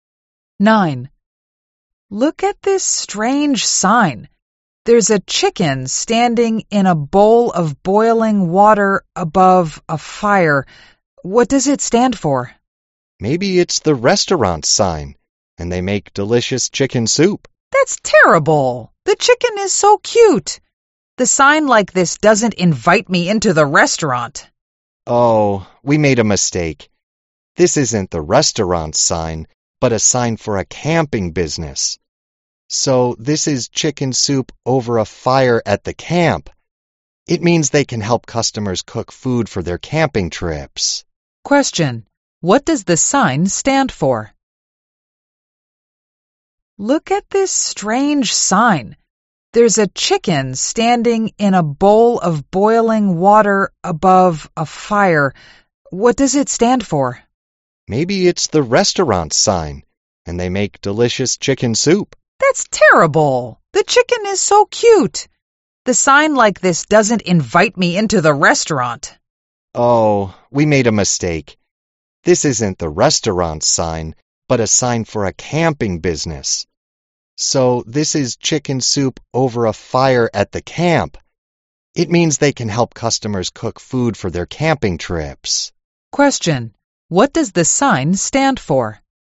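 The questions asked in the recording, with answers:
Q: What does the sign stand for?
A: A camping business that helps customers cook food for camping trips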